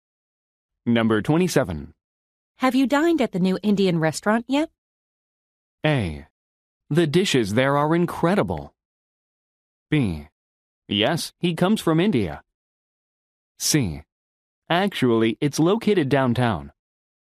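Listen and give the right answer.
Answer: A: The dishes there are incredible.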